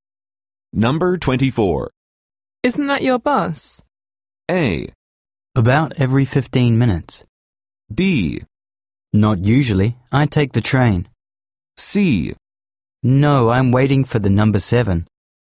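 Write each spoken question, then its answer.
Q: Isn't that your bus?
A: C: No, I'm waiting for the number 7.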